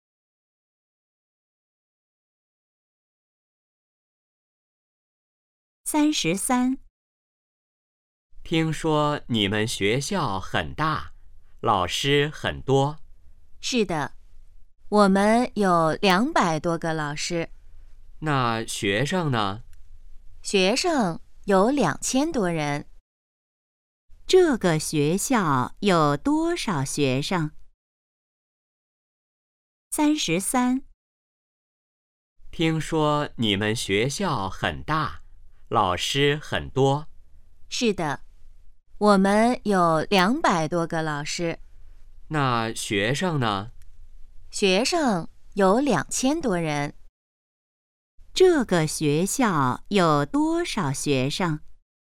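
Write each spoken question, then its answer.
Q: 这个学校有多少学生?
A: 2000多人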